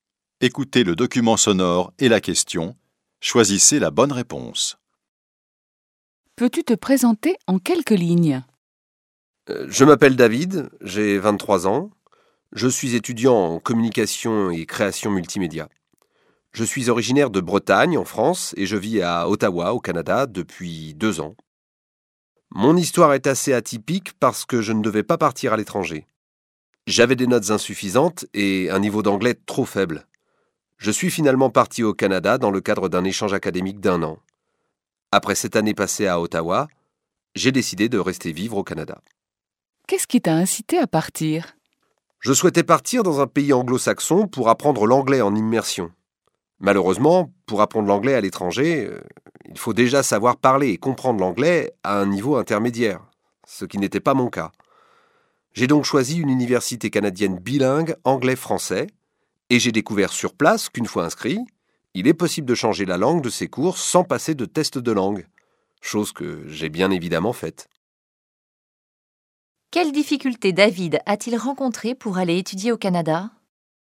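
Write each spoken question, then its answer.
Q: Quelles difficultés David a-t-il rencontrées pour aller étudier au Canada ?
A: Il avait des notes insuffisantes et un niveau d'anglais trop faible.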